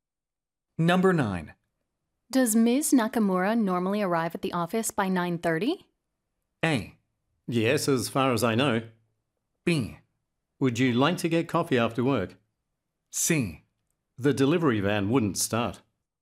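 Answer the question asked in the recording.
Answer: A: Yes, as far as I know.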